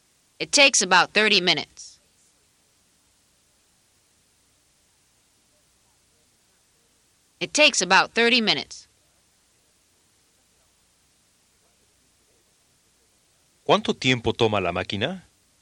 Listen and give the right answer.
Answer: It takes about 30 minutes.